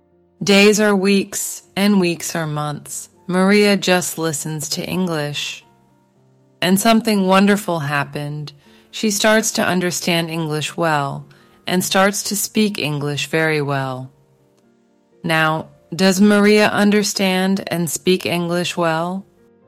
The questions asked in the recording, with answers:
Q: Now, does Maria understand and speak English well?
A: Yes, she does. Now she can understand and speak English well.